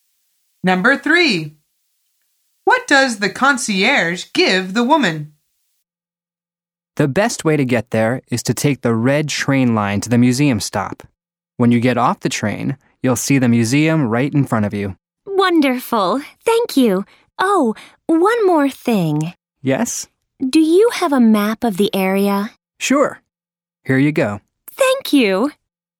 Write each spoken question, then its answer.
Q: What does the concierge give the woman?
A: The answer is a map.